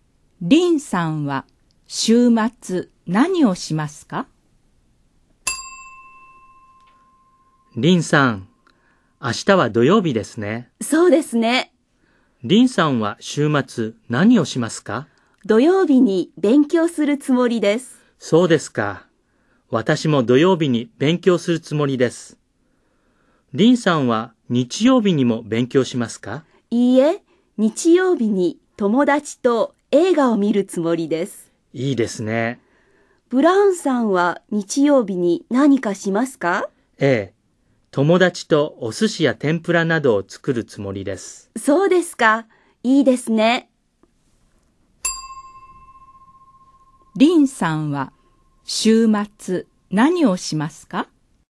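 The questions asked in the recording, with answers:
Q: リンさんは週末何をしますか?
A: 土曜日に勉強して、日曜日に友達と映画を見ます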